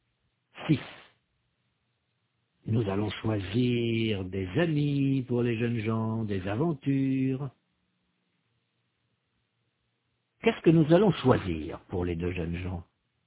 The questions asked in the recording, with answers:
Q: Qu'est-ce que nous allons choisir pour les deux jeunes gens?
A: Des amis, des aventures, des voyages.